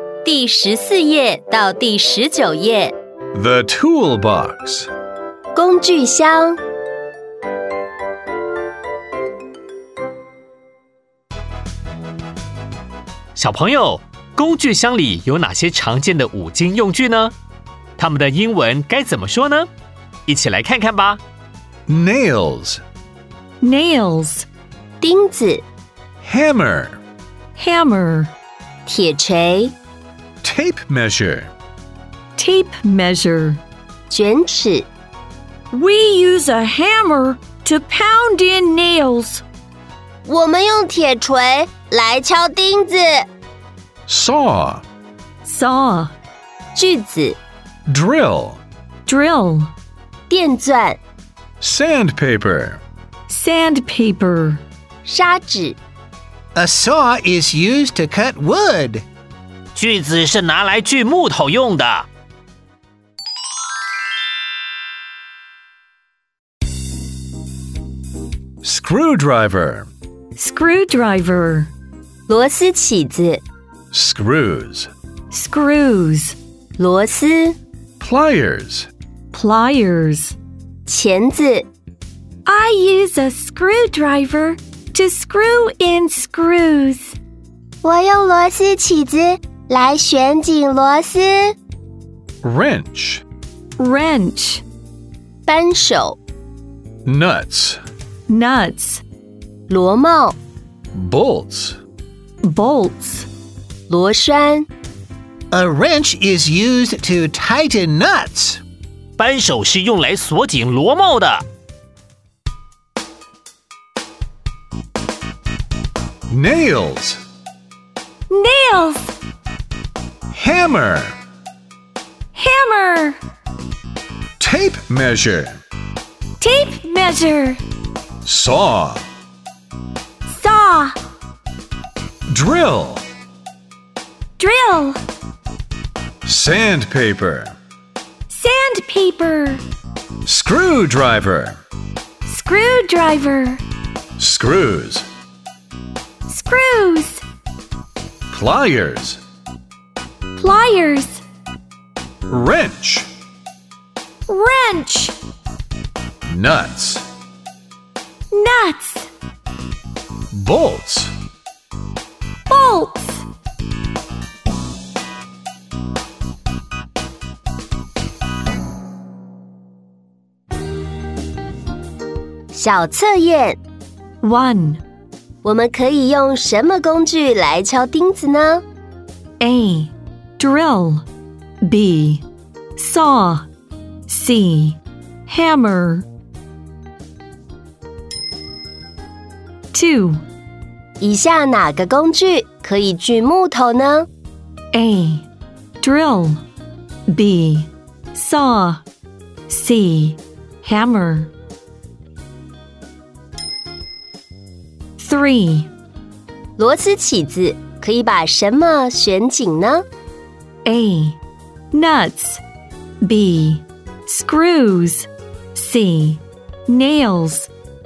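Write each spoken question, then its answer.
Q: 我们可以用什么工具来敲钉子呢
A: C: Hammer

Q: 以下哪个工具可以锯木头呢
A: B: Saw

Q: 螺丝起子可以把什么旋紧呢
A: B: Screws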